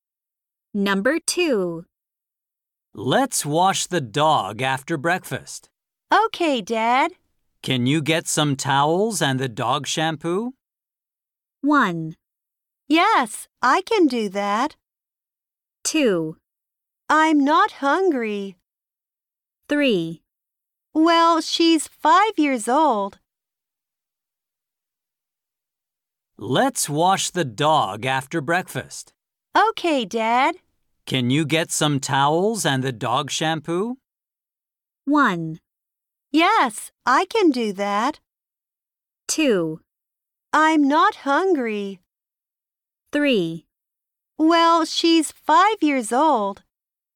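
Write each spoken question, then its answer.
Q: Can you get some towels and the dog shampoo?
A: 1: Yes, I can do that.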